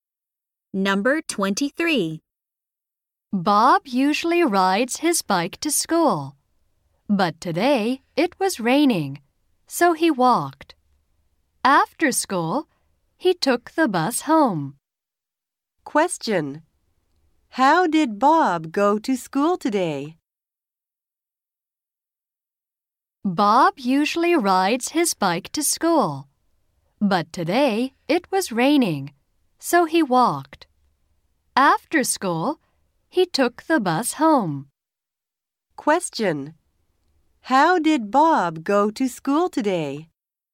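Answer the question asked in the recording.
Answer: He walked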